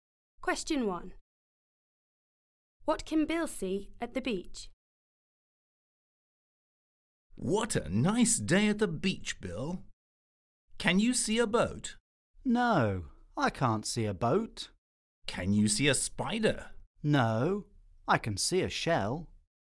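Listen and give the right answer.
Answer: A shell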